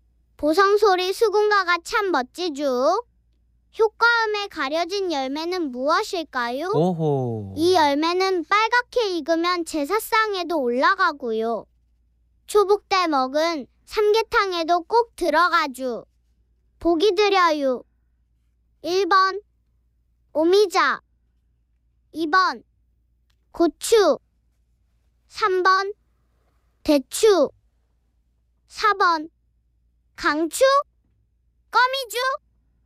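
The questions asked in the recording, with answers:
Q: 효과음에 가려진 열매는 무엇일까요?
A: 3번: 대추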